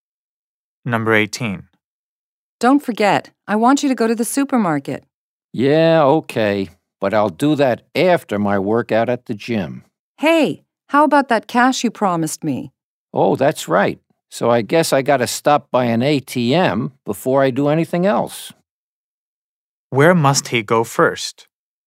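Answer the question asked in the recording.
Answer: To an ATM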